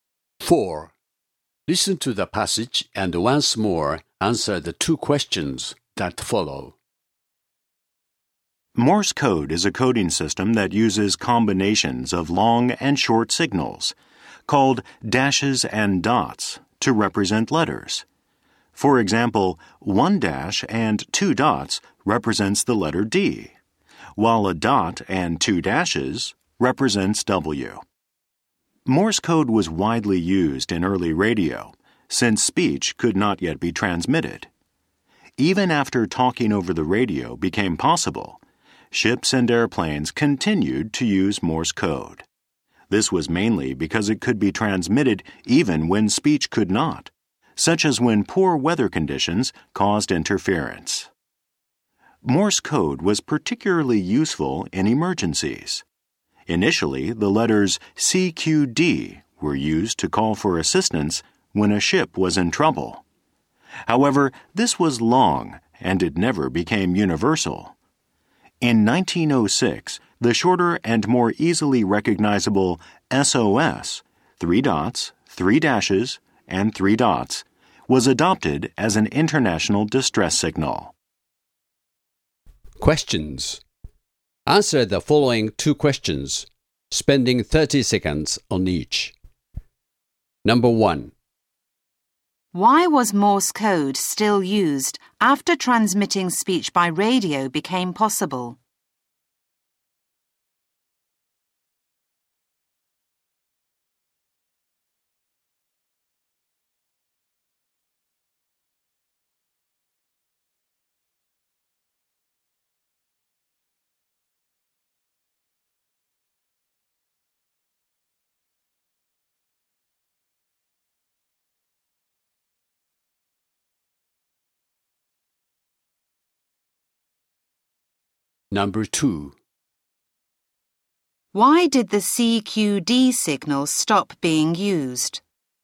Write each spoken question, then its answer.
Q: Why was Morse code still used after transmitting speech by radio became possible?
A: Morse code was still used because it had the advantage of being transmittable even in poor weather when speech transmissions would be difficult to understand.

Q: Why did the CQD signal stop being used?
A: The letters CQD took too long to transmit and never